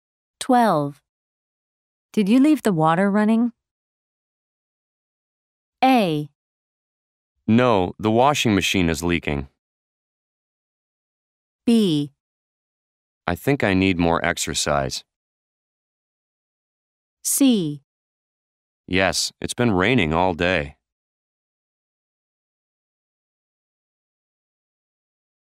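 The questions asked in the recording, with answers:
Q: Did you leave the water running?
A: A: No, the washing machine is leaking.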